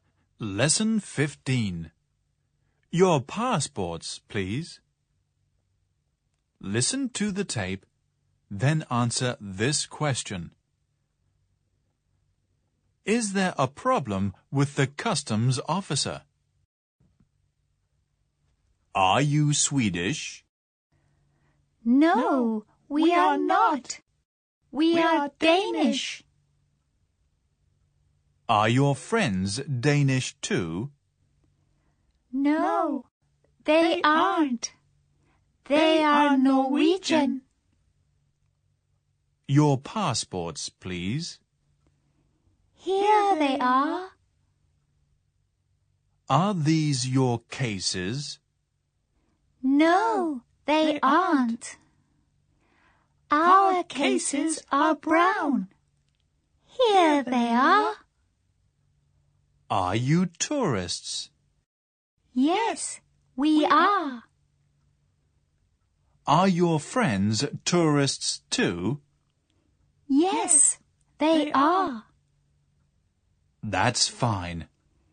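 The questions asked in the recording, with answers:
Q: Is there a problem with the customs officer?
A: No, there isn't.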